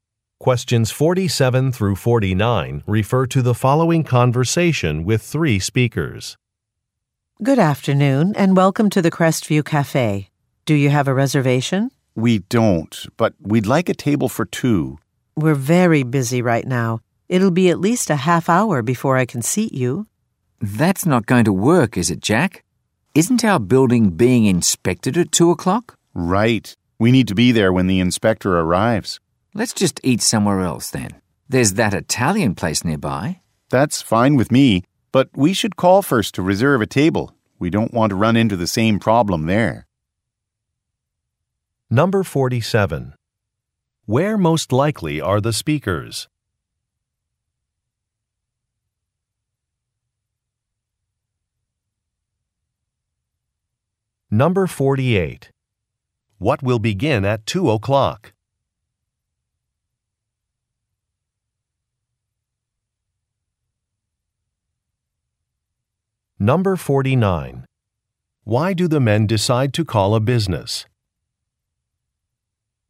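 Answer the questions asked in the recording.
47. At a cafe
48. A building inspection
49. To reserve a table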